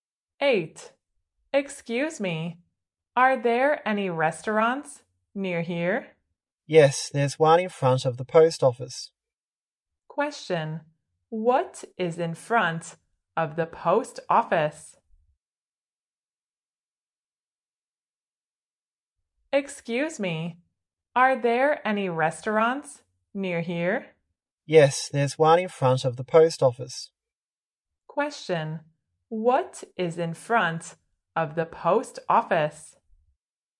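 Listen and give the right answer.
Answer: A restaurant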